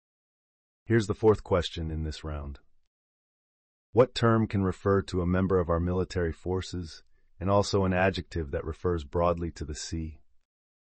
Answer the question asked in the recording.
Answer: The answer is Marine.